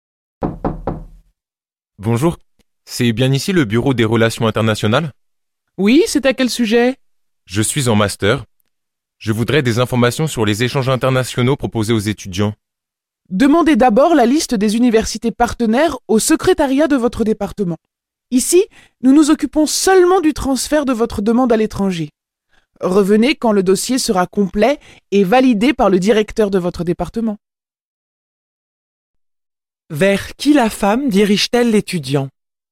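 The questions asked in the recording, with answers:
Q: Vers qui la femme dirige-t-elle l'étudiant ?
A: Vers le secrétariat de son département.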